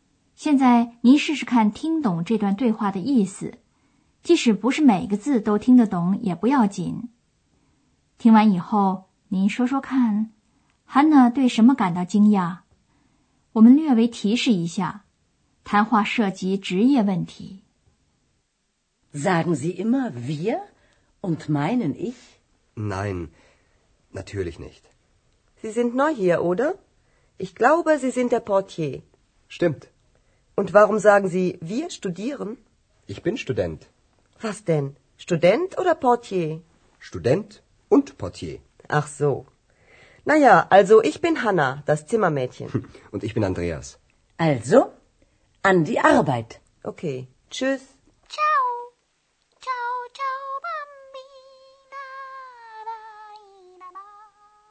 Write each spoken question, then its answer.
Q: Hanna 对什么感到惊讶?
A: Hanna 感到奇怪的是, Andreas 说自己是大学生,而他先前却向 Hanna 承认说他是门房。